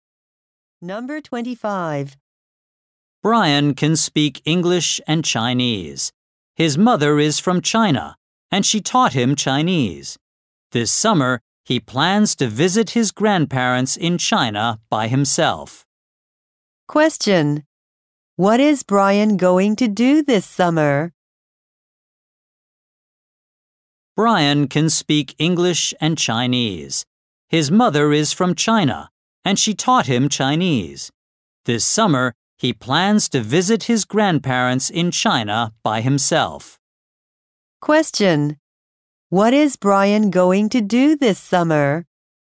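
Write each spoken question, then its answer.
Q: What is Brian going to do this summer?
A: Visit his grandparents in China by himself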